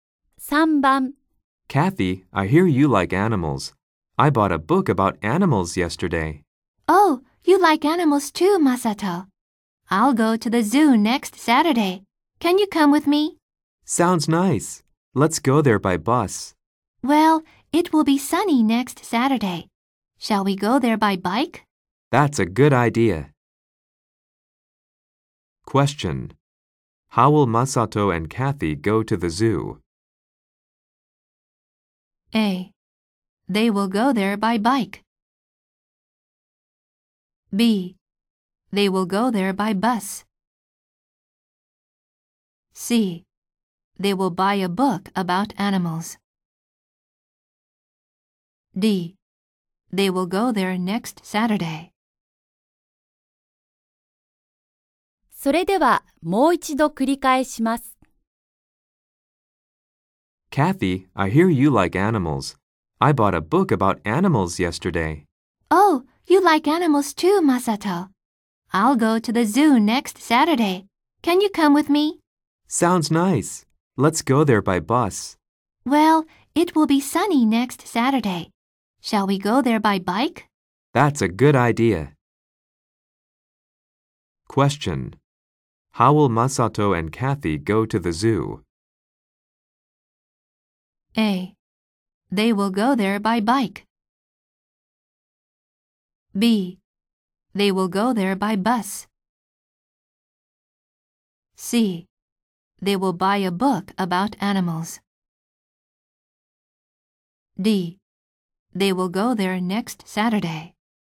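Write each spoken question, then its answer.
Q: How will Masato and Kathy go to the zoo?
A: A: They will go there by bike.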